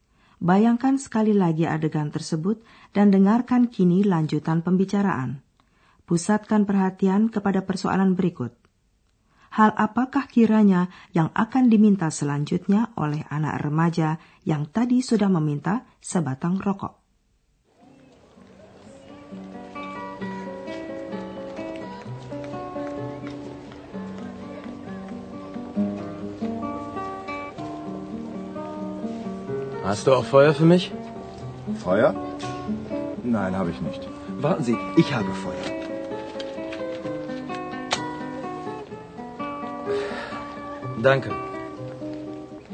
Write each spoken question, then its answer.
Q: Hal apakah kiranya yang akan diminta selanjutnya oleh anak remaja yang tadi sudah meminta sebatang rokok?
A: Kalau mau merokok, tentu saja orang memerlukan api.